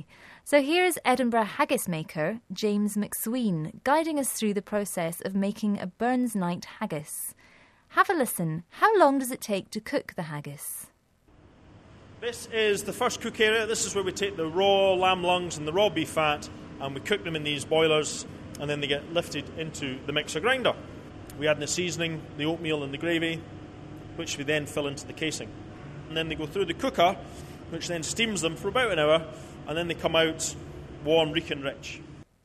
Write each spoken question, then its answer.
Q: How long does it take to cook the haggis?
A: So he said that once the haggises have cooked for an hour